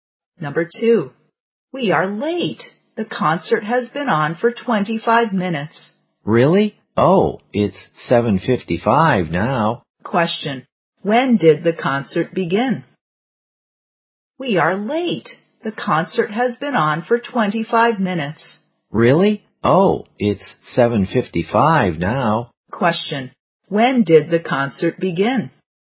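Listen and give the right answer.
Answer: At 7:30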